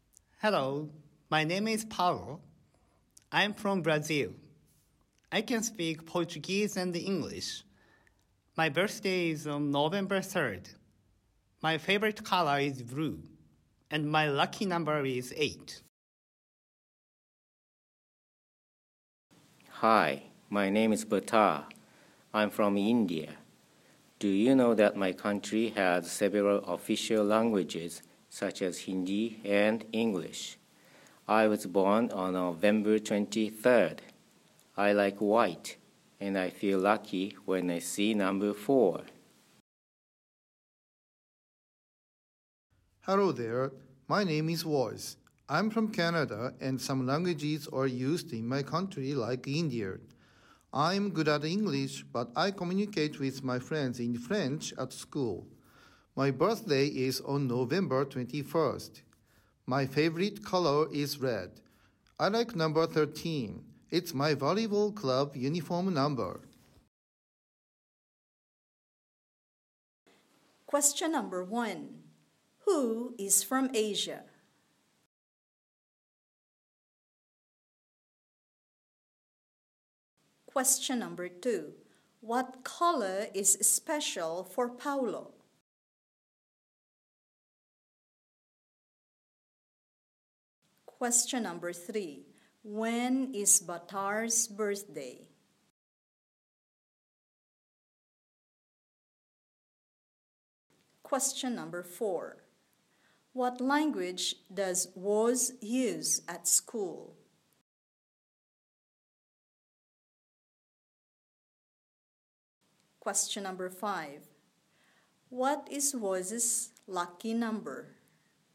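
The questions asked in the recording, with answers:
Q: Who is from Asia?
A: Bhattar

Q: What color is special for Paulo?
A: Blue

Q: When is Bhattar's birthday?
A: November 23rd

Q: What language does Woz use at school?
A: French

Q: What is Woz's lucky number?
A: 13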